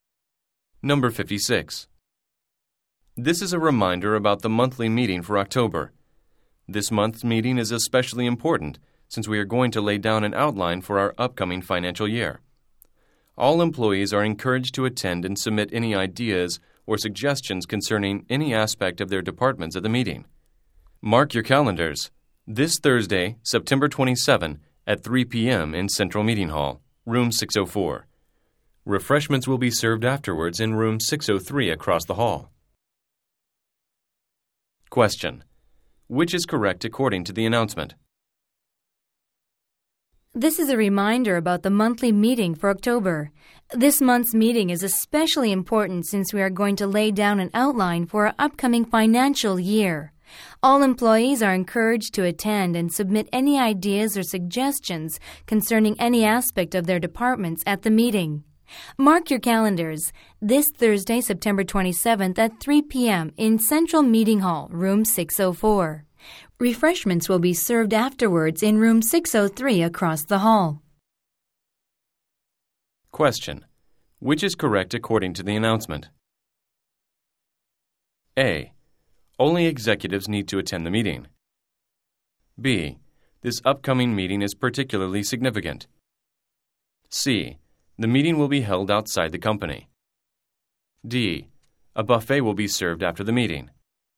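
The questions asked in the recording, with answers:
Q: Which is correct according to the announcement?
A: B: This upcoming meeting is particularly significant.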